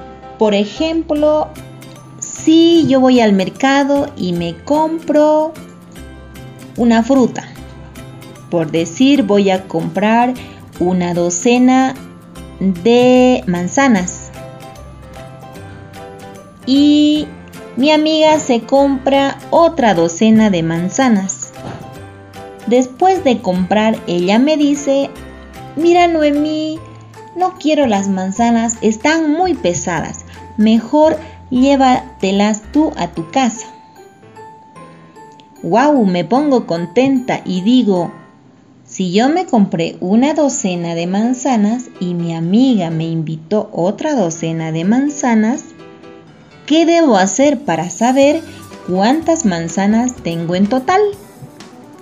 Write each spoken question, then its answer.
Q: ¿Qué debo hacer para saber cuántas manzanas tengo en total?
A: Sí, debo sumar.